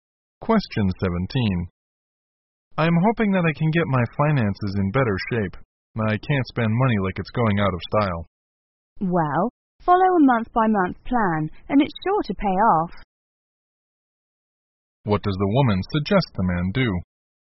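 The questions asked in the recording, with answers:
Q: What does the woman suggest the man do?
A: Follow a month-by-month budget plan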